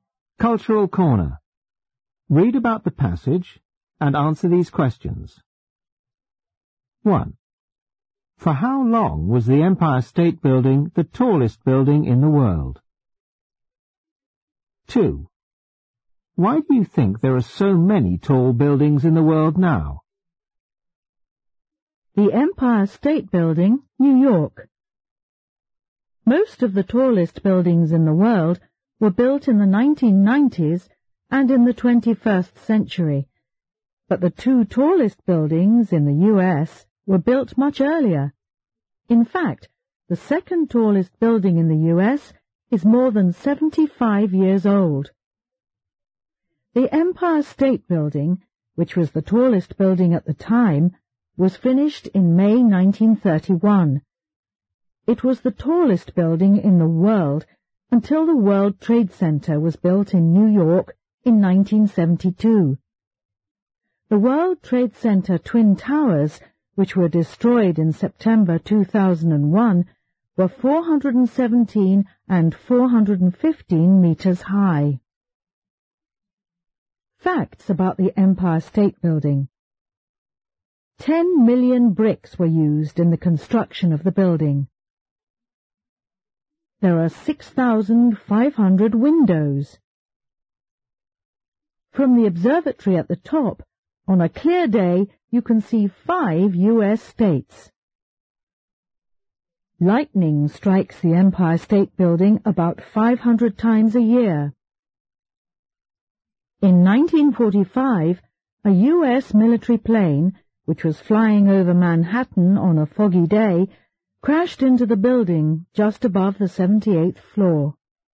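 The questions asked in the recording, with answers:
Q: For how long was the Empire State Building the tallest building in the world?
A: About 41 years (from 1931 until 1972)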